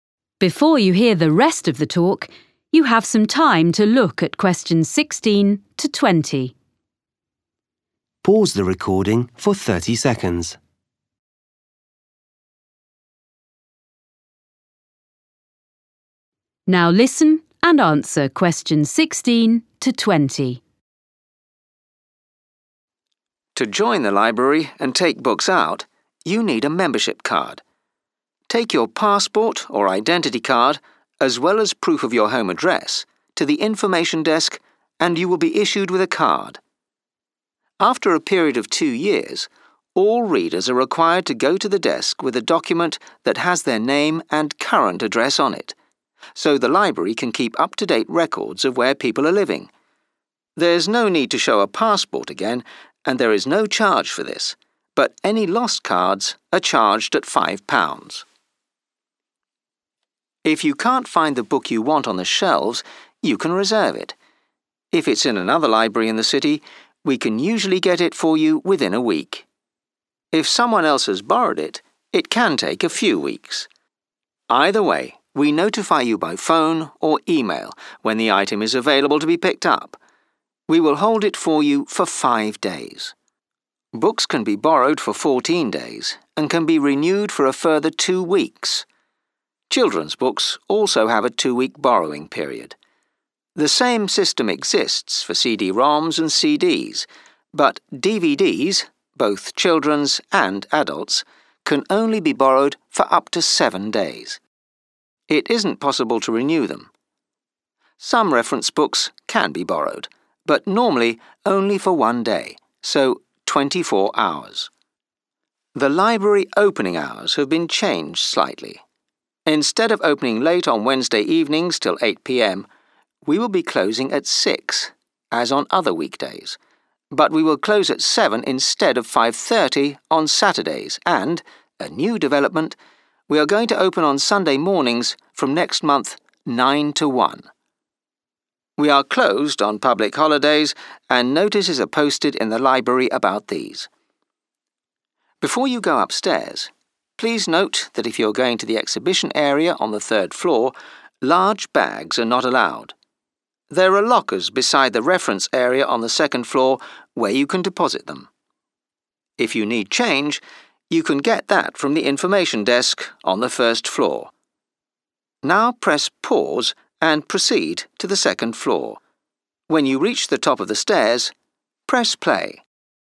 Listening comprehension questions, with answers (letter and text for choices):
Choose the correct letter, A, B or C.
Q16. After two years, library members have to:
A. show proof of their current address.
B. pay for a new membership card.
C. bring a passport or identity card into the library.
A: A. show proof of their current address.

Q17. What happens if you reserve a book?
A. It will be available after five days.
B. You can collect it a week later.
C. You will be contacted when it is available.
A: C. You will be contacted when it is available.

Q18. Which materials can be borrowed for one week only?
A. some reference books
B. CD-ROMs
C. children's DVDs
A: C. children's DVDs

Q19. On which day does the library stay open later than it used to?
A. Wednesday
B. Saturday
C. Sunday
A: B. Saturday

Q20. Large bags should be left on the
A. first floor.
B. second floor.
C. third floor.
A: B. second floor.

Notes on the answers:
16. B: You only pay for a lost membership card ('any lost cards are charged at £5'); C: A passport or identity card is only necessary when you first register ('There's no need to show a passport again').
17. A: 'five days' is the length of time books are held after you've been contacted; B: If the book is in 'another library', you can usually have it 'within a week' but 'it can take a few weeks' if someone else has borrowed it.
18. A: Reference books can only be borrowed for 'one day'; B: CD-ROMs can be borrowed for the same period as books ('fourteen days').
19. A: The library closes earlier than it used to on Wednesdays, not later; C: The library is going to be open on Sunday mornings but this is a 'new development'.
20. A: You can get change for the lockers on the first floor; C: You 'are not allowed' to take large bags to the exhibition area on the third floor.